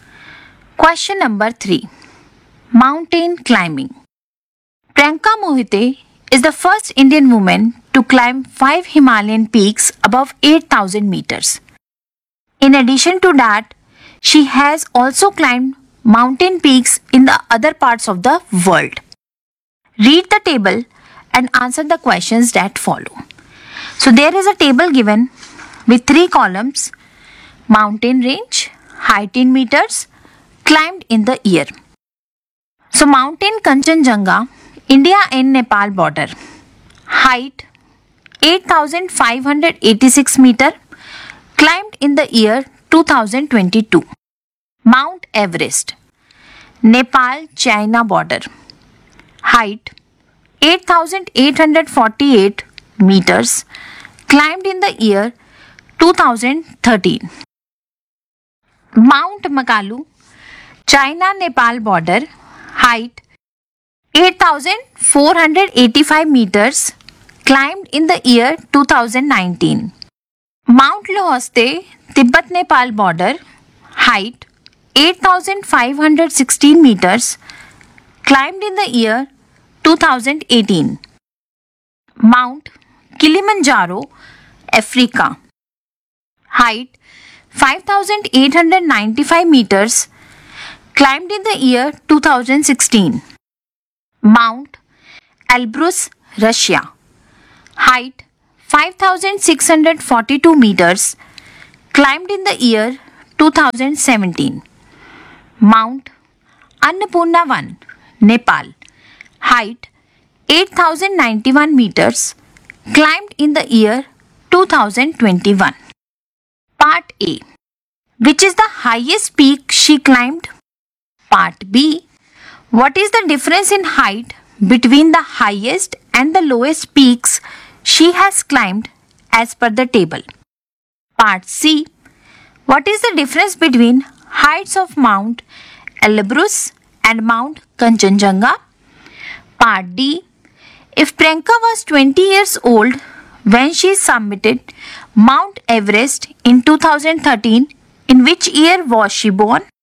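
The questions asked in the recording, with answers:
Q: Which is the highest peak she climbed?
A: Mount Everest (8,848 m)

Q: What is the difference in height between the highest and the lowest peaks she has climbed as per the table?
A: 3,206 meters

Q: What is the difference between heights of Mount Elbrus and Mount Kanchenjunga?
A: 2,944 meters

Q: If Priyanka was 20 years old when she summited Mount Everest in 2013, in which year was she born?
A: 1993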